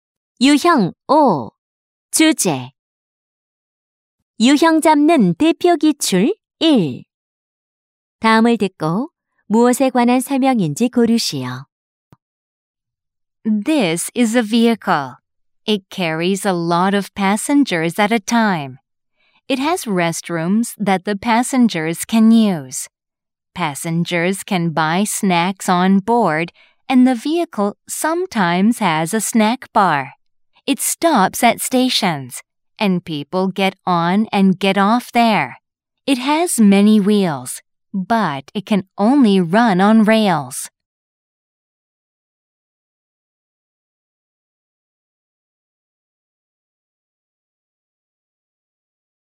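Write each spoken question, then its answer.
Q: 다음을 듣고 무엇에 관한 설명인지 고르시오.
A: 기차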